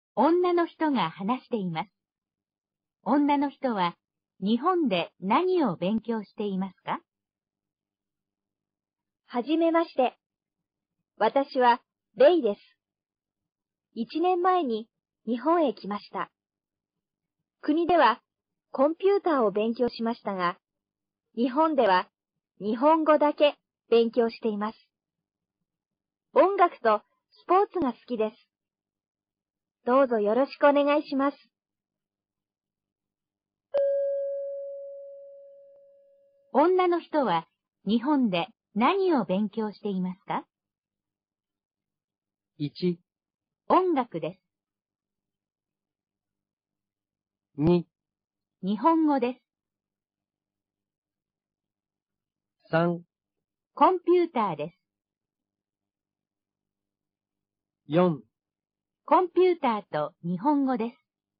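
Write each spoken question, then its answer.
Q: 女の人は日本で何を勉強していますか?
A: 2: 日本語です。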